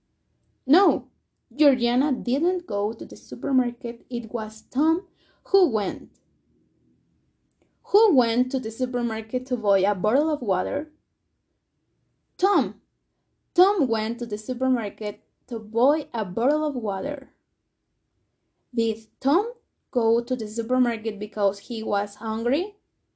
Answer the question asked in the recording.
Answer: No, he didn't go there because he was hungry but thirsty.